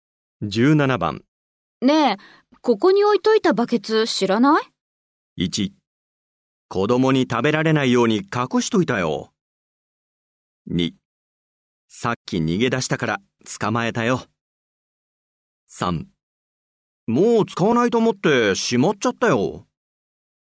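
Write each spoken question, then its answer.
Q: ねえ、ここに置いといたバケツ知らない?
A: 3: もう使わないと思ってしまっちゃったよ。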